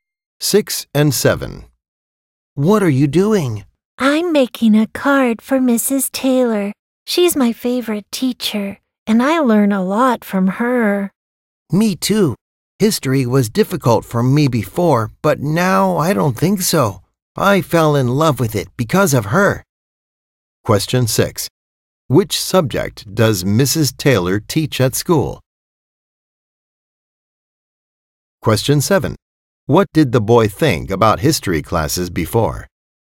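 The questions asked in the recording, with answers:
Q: Which subject does Mrs. Taylor teach at school?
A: History

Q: What did the boy think about history classes before?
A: They were difficult.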